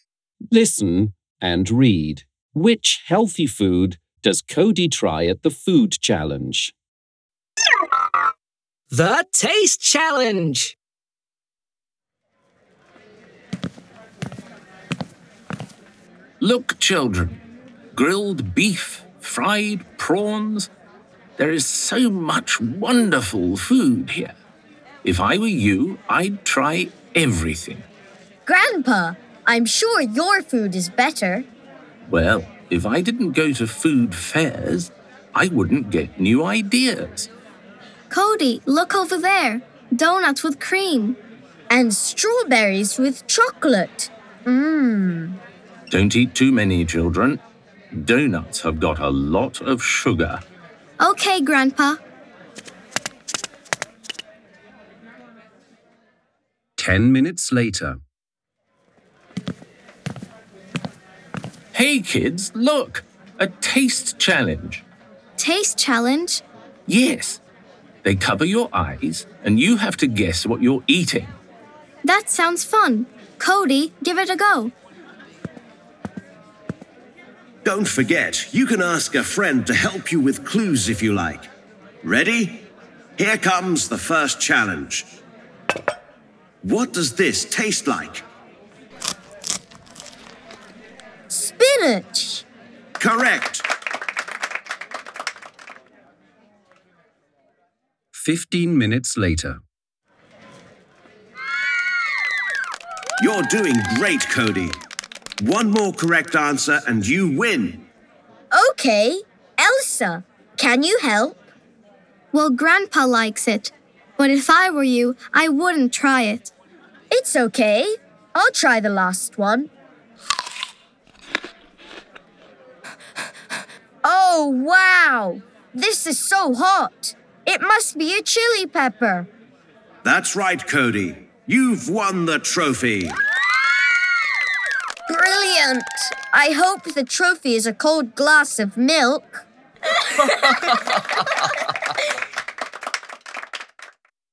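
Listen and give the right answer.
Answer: Spinach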